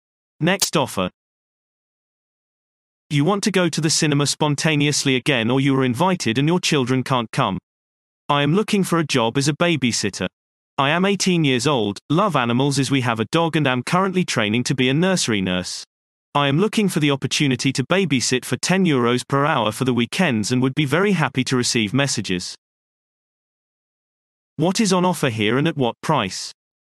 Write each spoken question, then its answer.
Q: What is on offer here and at what price?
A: Response. Childcare is offered at weekends for €10 per hour.